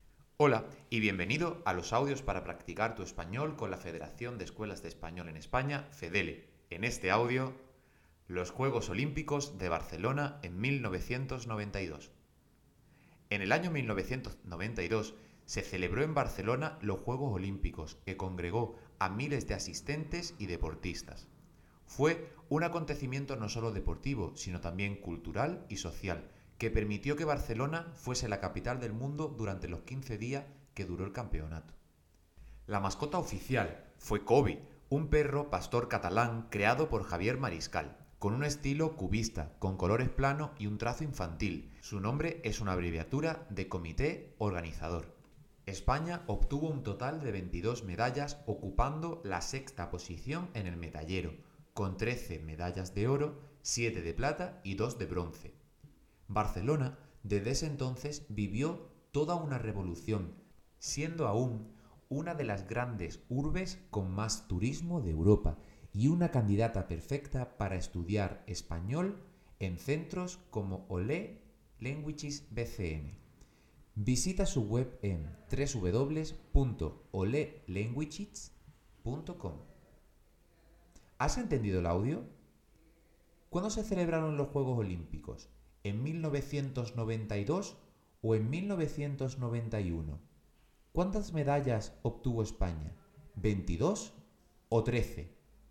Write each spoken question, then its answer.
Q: ¿Cuándo se celebraron los Juegos Olímpicos?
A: fue en 1992

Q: ¿Cuántas medallas obtuvo España?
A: las medallas que obtuvo España fueron 22